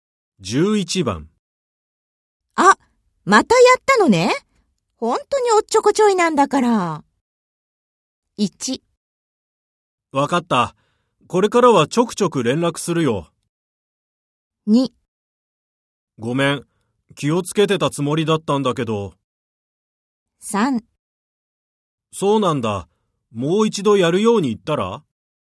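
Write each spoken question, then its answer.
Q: あ、またやったのね。本当におっちょこちょいなんだから。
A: 2: ごめん。気をつけてたつもりだったんだけど。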